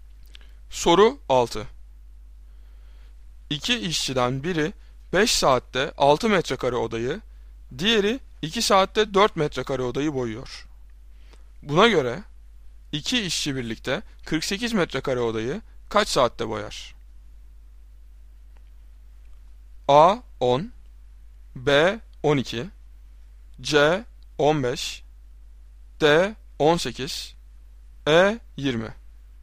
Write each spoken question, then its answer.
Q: Buna göre iki işçi birlikte 48 metrekare odayı kaç saatte boyar?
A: Doğru cevap C 15.